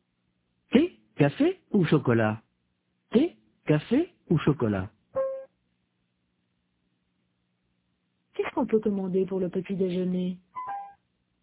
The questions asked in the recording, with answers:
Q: Qu'est-ce qu'on peut commander pour le petit déjeuner?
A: Du thé, du café ou du chocolat?